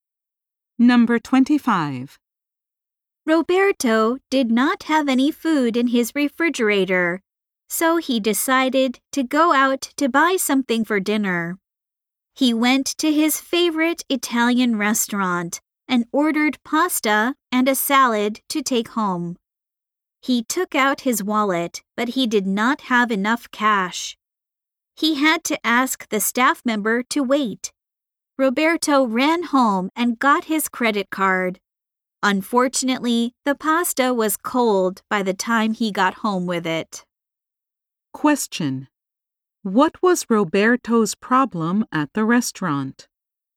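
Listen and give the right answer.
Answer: He did not have enough cash.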